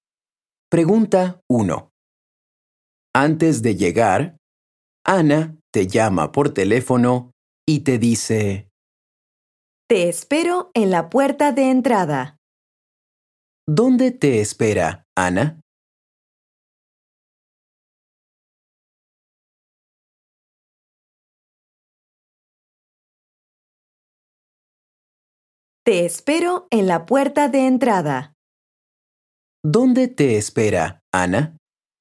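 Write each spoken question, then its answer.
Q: ¿Dónde te espera, Ana?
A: En la puerta de entrada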